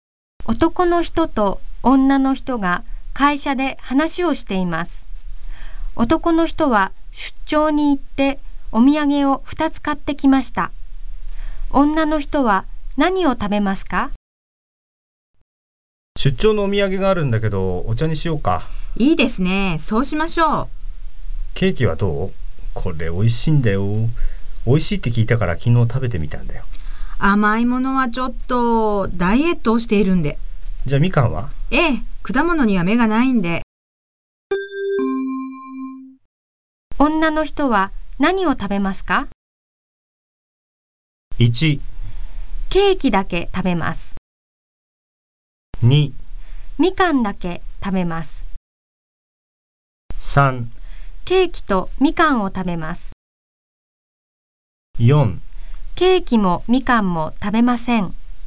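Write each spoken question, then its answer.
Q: 女の人は何を食べますか?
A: 2: みかんだけ食べます。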